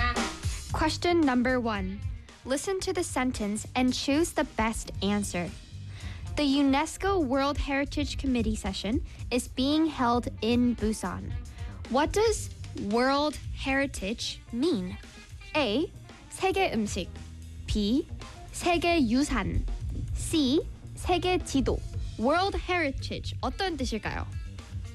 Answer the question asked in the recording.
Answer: That's right. B. 네. 네, 세계 유산입니다.